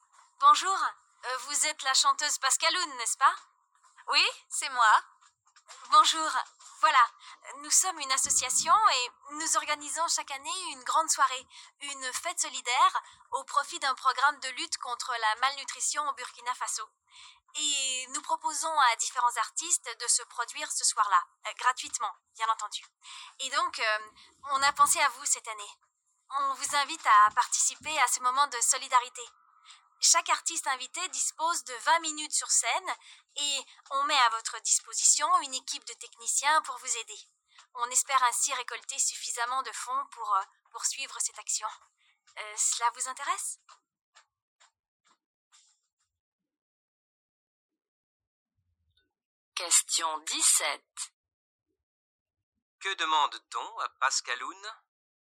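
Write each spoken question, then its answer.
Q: Que demande-t-on à Pascaloun ?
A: De chanter gratuitement lors d'une soirée solidaire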